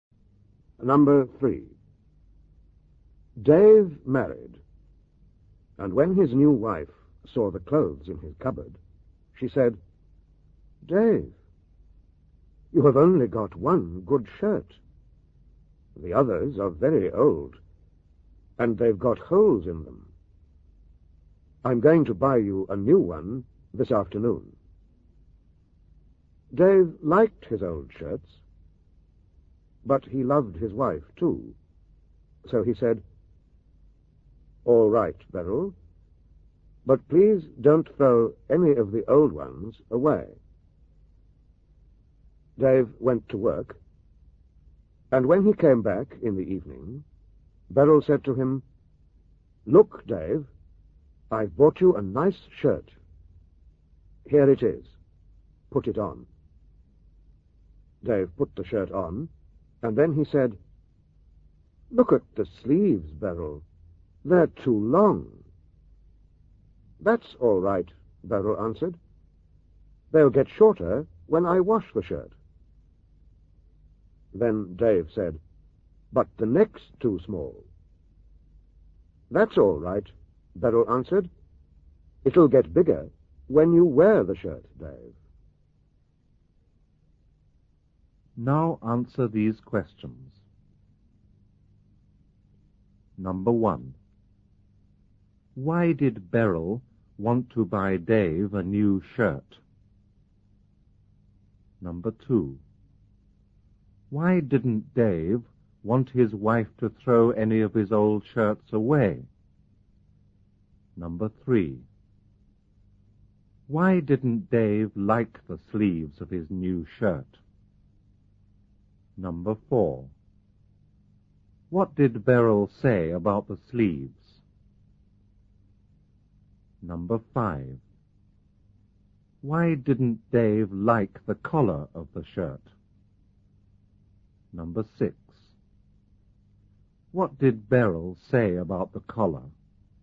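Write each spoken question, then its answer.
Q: Why did Beryl want to buy Dave a new shirt?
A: He had only one good shirt; the others were very old and had holes in them.

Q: Why didn't Dave want his wife to throw any of his old shirts away?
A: Because he liked his old shirts.

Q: Why didn't Dave like the sleeves of his new shirt?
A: They were too long.

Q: What did Beryl say about the sleeves?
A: They'll get shorter when she washes the shirt.

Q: Why didn't Dave like the collar of the shirt?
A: The neck was too small.

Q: What did Beryl say about the collar?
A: It'll get bigger when he wears the shirt.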